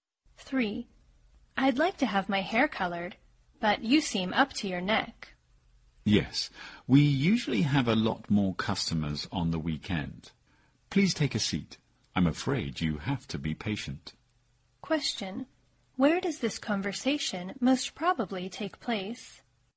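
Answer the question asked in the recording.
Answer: At a hair salon.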